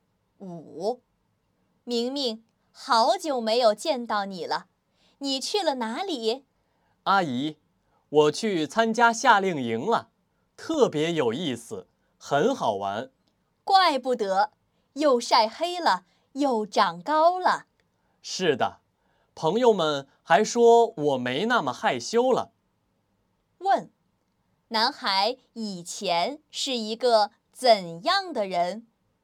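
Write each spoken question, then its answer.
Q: 男孩以前是一个怎样的人?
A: 很害羞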